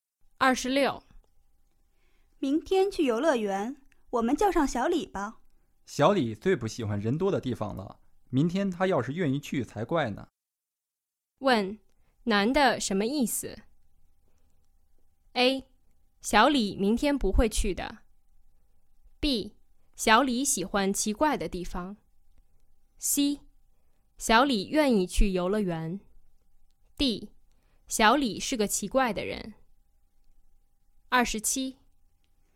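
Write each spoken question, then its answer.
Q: 问, 男的什么意思?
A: A: 小李明天不会去的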